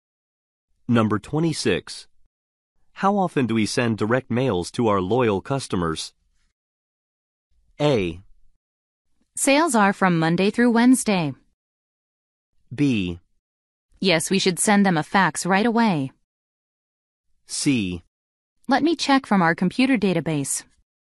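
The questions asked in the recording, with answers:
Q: How often do we send direct mails to our loyal customers?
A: C: Let me check from our computer database.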